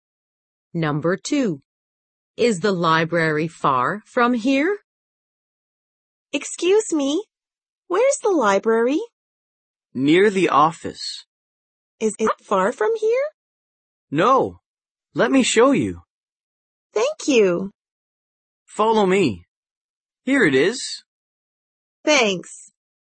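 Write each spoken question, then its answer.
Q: Is the library far from here?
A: No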